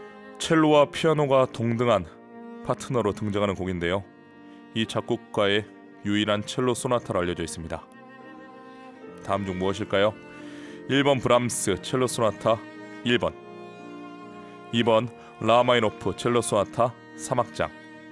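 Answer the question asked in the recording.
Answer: 2번: 라흐마니노프 첼로 소나타 3악장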